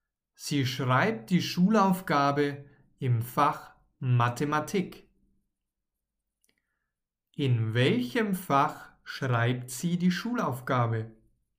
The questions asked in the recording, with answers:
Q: In welchem Fach schreibt sie die Schulaufgabe?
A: Im Fach Mathematik.